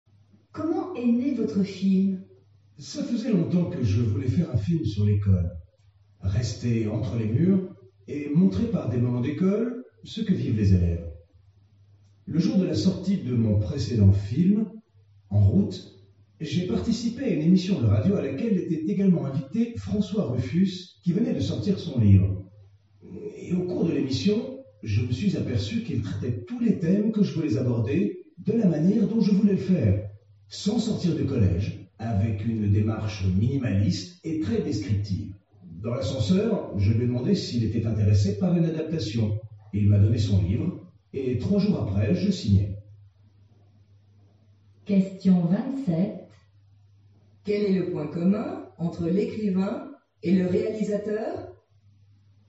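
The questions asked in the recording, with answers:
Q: Quel est le point commun entre l'écrivain et le réalisateur ?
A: Ils veulent traiter les mêmes thèmes sur l'école de la même manière : sans sortir du collège, avec une démarche minimaliste et très descriptive.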